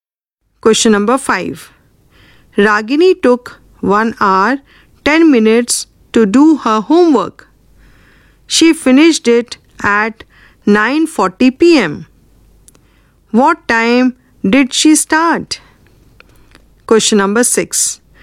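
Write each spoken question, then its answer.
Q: What time did she start?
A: 8:30 p.m.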